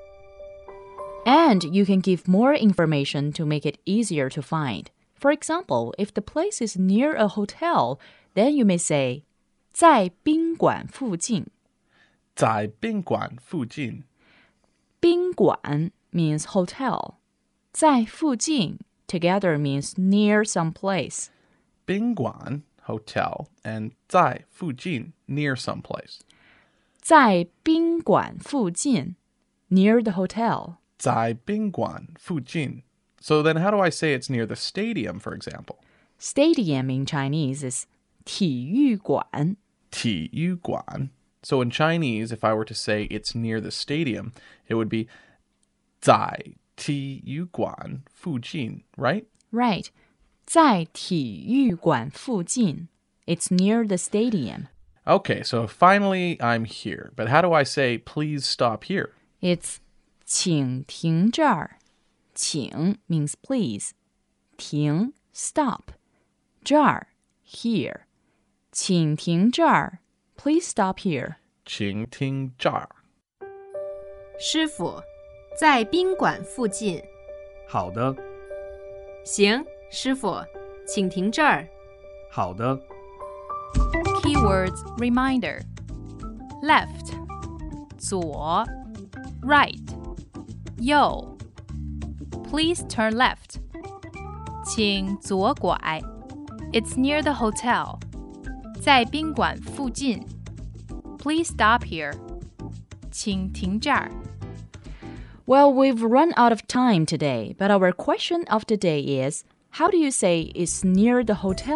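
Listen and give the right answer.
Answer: 在宾馆附近 (zài bīnguǎn fùjìn)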